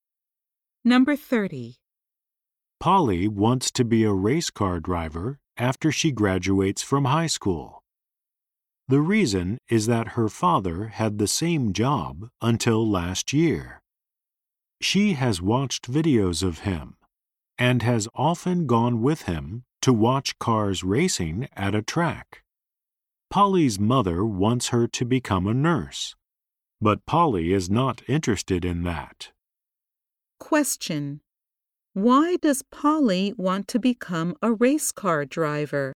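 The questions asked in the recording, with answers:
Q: why does Polly want to become a race car driver?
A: Her father was a race car driver.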